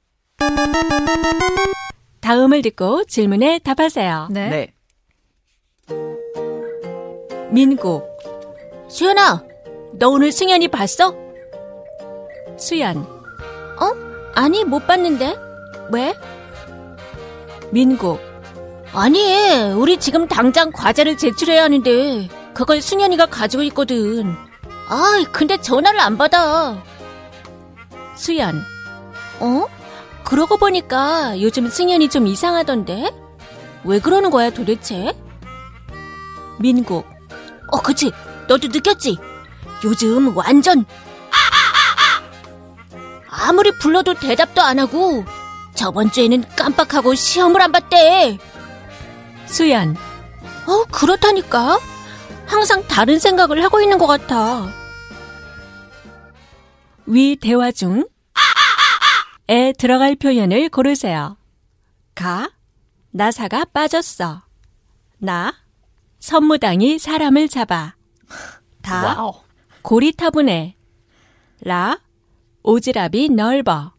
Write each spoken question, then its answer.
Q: 위 대화 중 에 들어갈 표현을 고르세요.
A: we successfully both picked 가, which is 나사가 빠졌어, which is to have a loose screw.